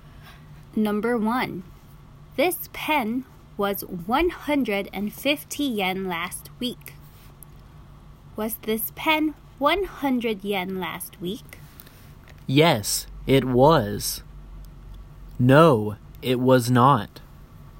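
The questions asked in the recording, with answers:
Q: Was this pen 100 yen last week?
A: No, it was not.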